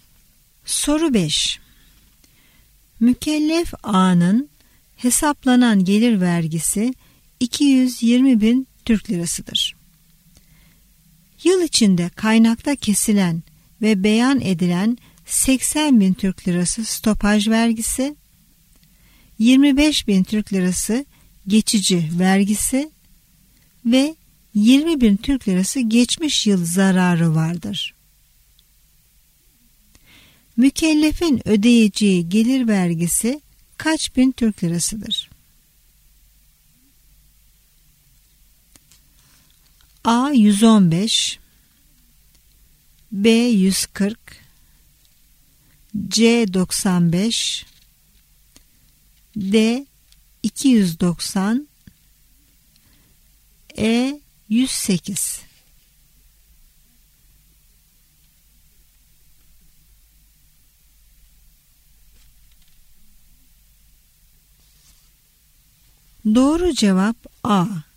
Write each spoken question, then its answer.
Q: Mükellefin ödeyeceği gelir vergisi kaç bin Türk lirasıdır?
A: Doğru cevap A.